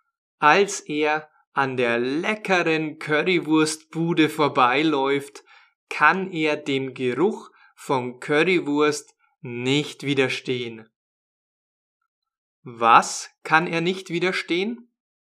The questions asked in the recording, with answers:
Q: Was kann er nicht widerstehen?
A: Dem Geruch von Currywurst.